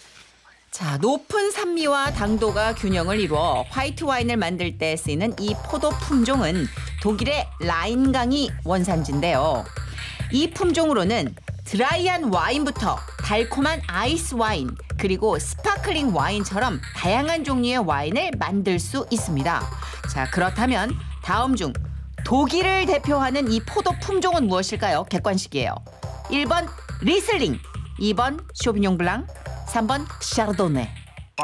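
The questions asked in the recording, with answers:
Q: 자, 그렇다면 다음 중 독일을 대표하는 이 포도 품종은 무엇일까요?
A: 1: 리슬링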